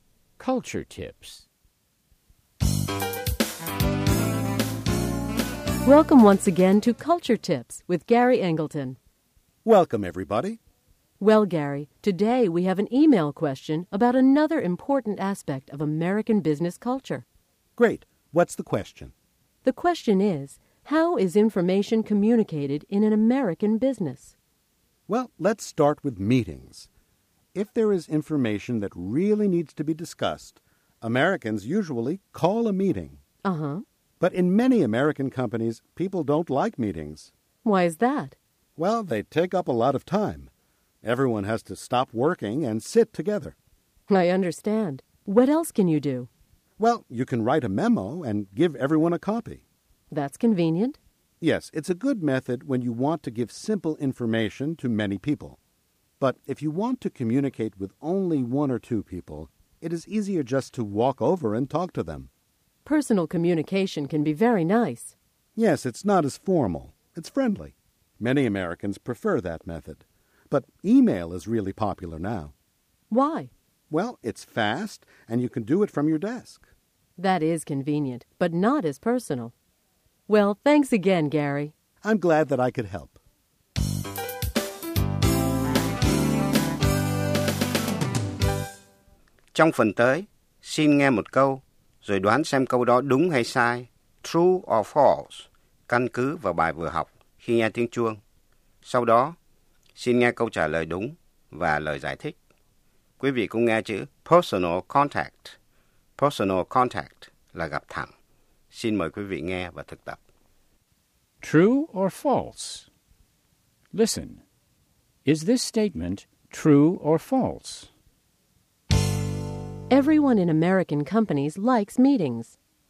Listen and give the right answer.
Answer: False. Many people think that meetings take up too much time.